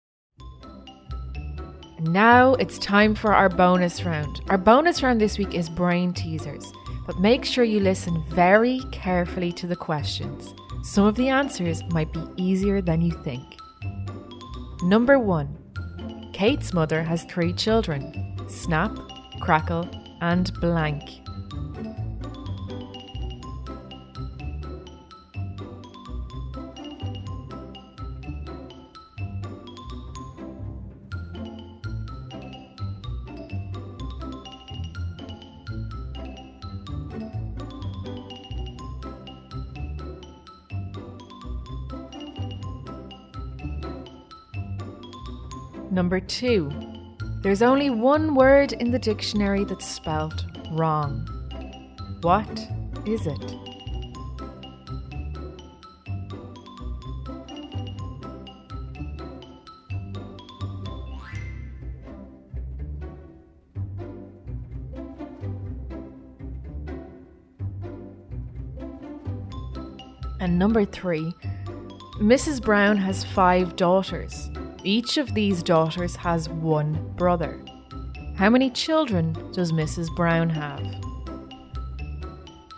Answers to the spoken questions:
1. Snap, Crackle, and Kate.
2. The answer is wrong.
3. The answer is six.